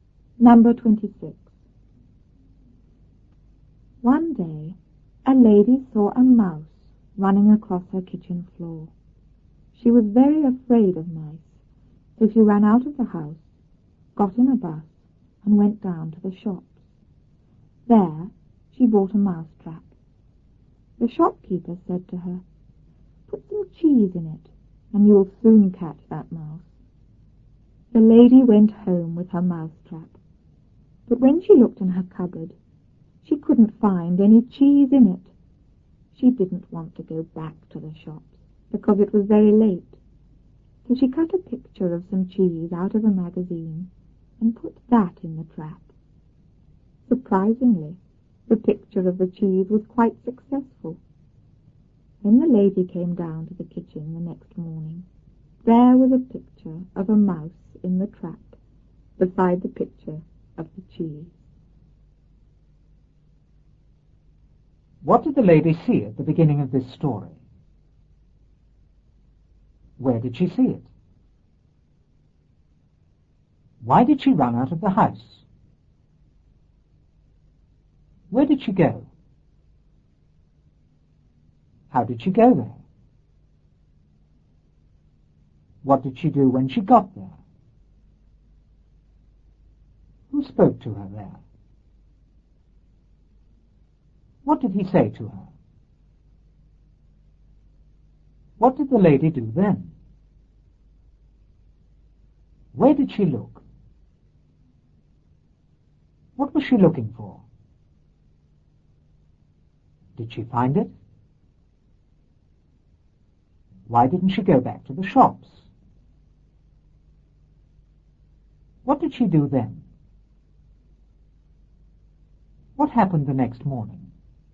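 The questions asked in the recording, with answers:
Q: What did the lady see at the beginning of this story?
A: A mouse running across her kitchen floor

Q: Where did she see it?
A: On her kitchen floor

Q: Why did she run out of the house?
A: She was very afraid of mice

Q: Where did she go?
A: Down to the shops

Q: How did she go there?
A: By bus

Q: What did she do when she got there?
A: She bought a mouse trap

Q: Who spoke to her there?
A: The shopkeeper

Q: What did he say to her?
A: Put some cheese in it, and you'll soon catch that mouse

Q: What did the lady do then?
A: She went home with her mouse trap

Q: Where did she look?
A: In her cupboard

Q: What was she looking for?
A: Cheese

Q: Did she find it?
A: No

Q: Why didn't she go back to the shops?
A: Because it was very late

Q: What did she do then?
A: She cut a picture of cheese out of a magazine and put it in the trap

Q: What happened the next morning?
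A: There was a picture of a mouse in the trap beside the picture of the cheese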